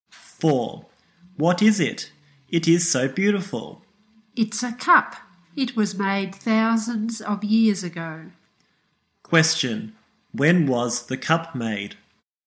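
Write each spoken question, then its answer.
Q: When was the cup made?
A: Thousands of years ago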